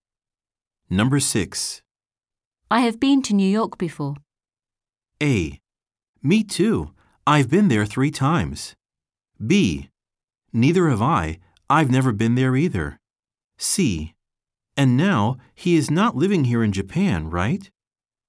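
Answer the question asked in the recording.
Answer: A: Me too. I've been there 3 times.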